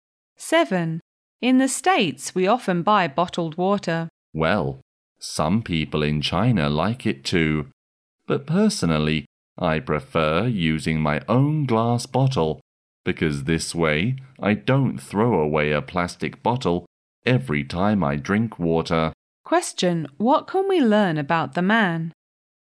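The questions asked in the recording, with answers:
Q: What can we learn about the man?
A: He prefers using his own glass bottle instead of buying bottled water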